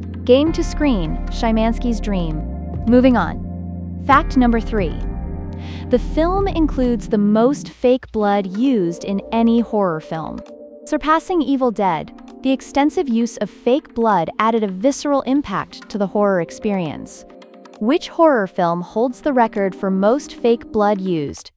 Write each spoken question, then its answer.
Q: Which horror film holds the record for most fake blood used?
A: Correct answer, Iron Lung.